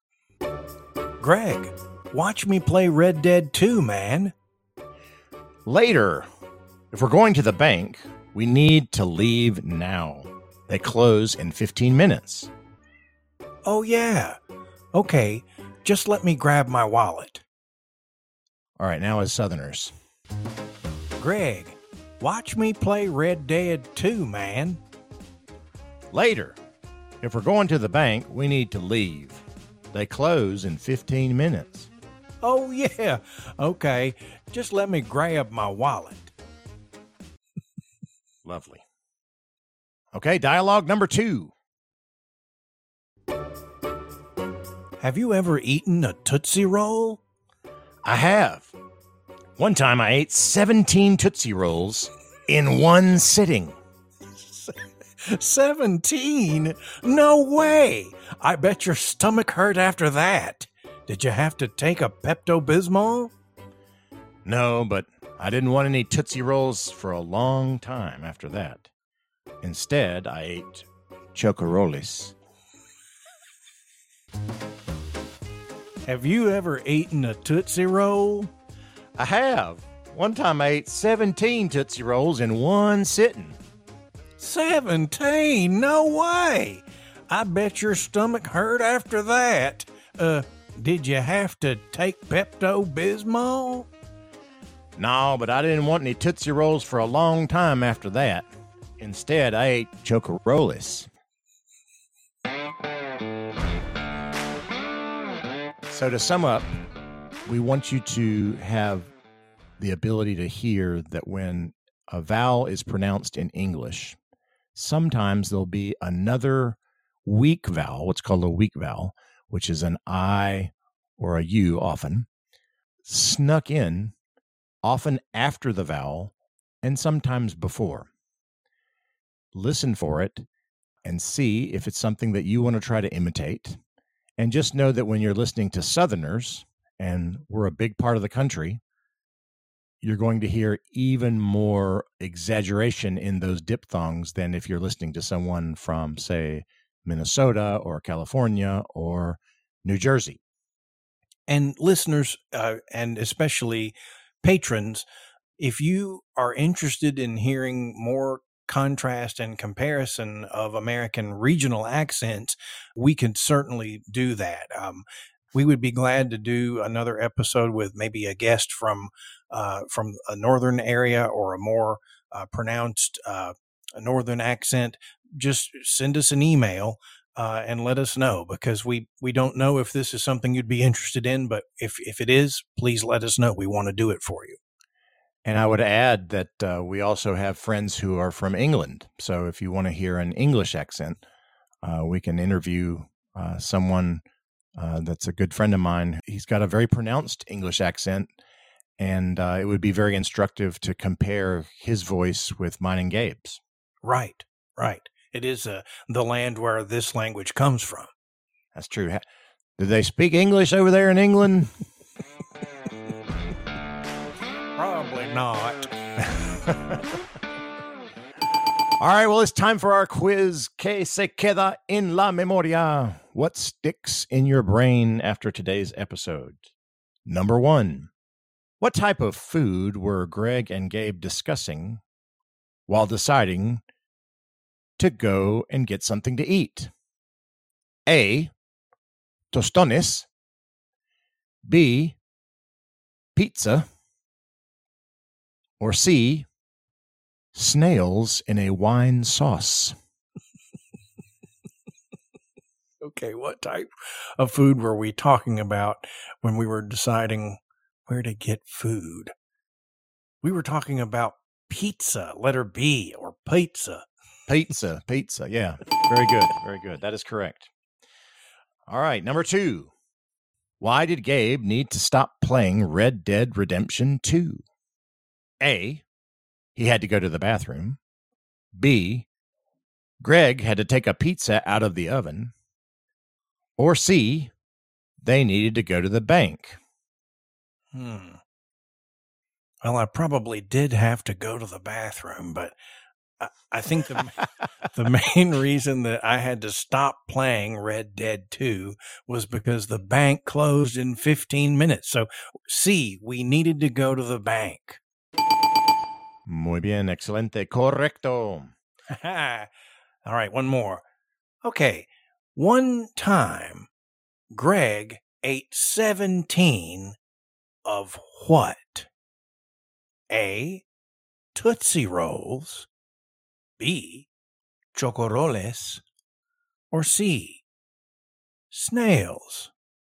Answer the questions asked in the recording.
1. So C, we needed to go to the bank.
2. So the answer is A, Tootsie Rolls